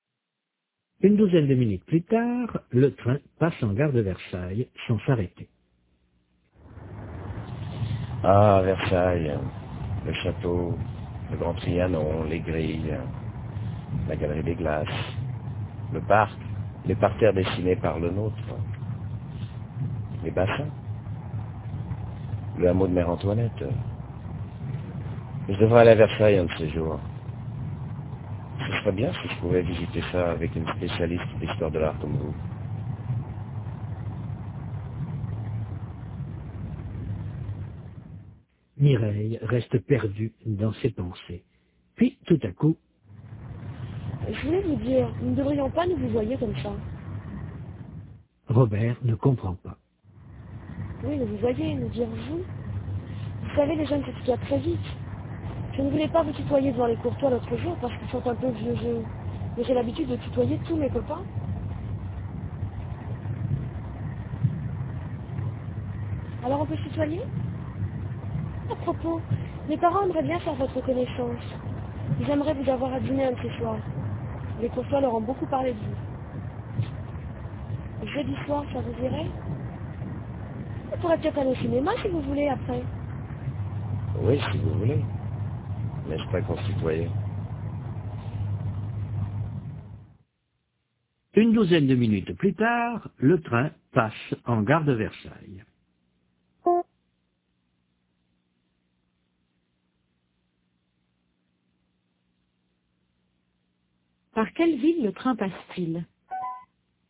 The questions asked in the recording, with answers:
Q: Par quelle ville le train passe-t-il ?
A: Par Versailles.